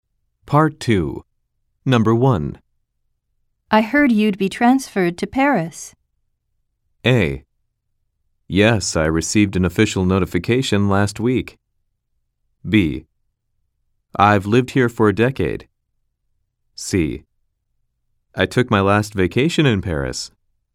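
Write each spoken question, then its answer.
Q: I heard you'd be transferred to Paris.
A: A: Yes, I received an official notification last week.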